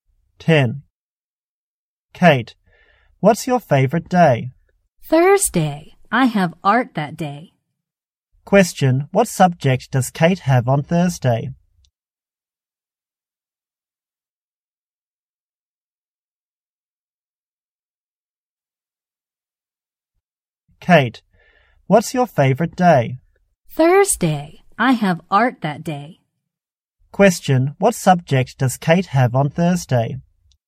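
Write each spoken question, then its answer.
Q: Question, what subject does Kate have on Thursday?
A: Art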